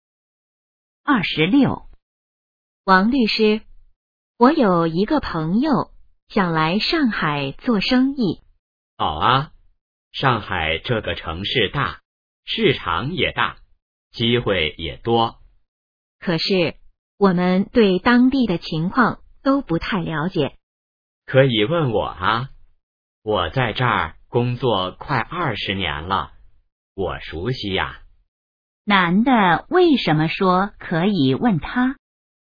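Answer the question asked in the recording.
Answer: 他在上海工作快20年了,熟悉当地情况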